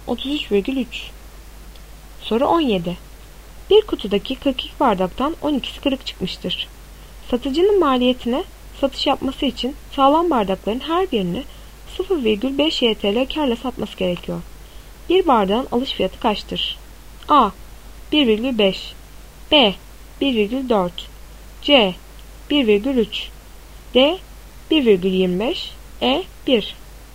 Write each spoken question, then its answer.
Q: Bir bardağın alış fiyatı kaçtır?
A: Doğru cevap D. 1,25.